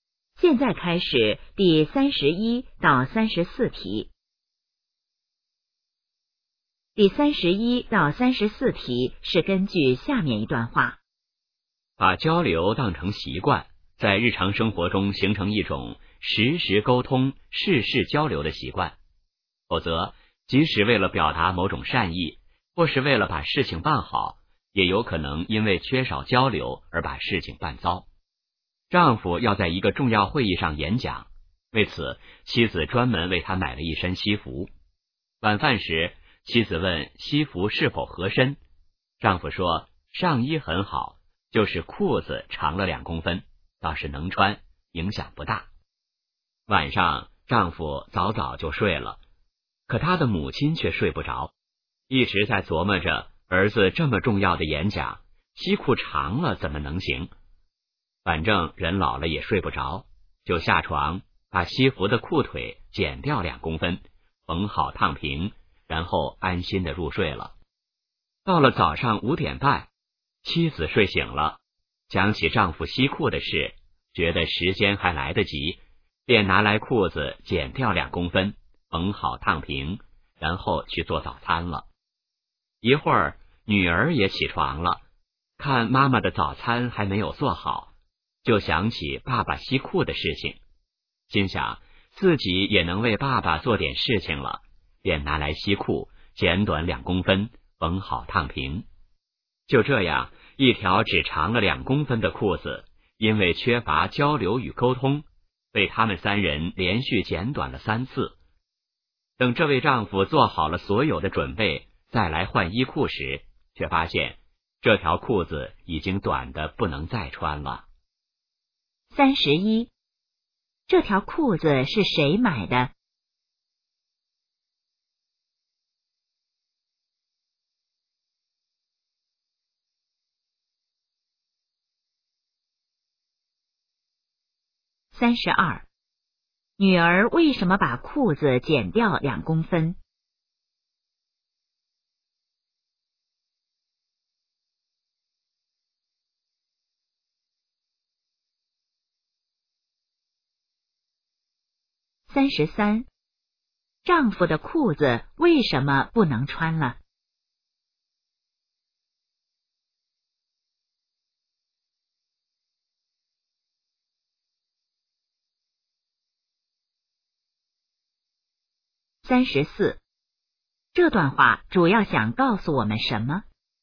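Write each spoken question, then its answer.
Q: 这条裤子是谁买的?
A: 妻子

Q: 女儿为什么把裤子剪掉2公分?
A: 想为爸爸做点事情

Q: 丈夫的裤子为什么不能穿了?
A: 被连续剪短了3次,太短了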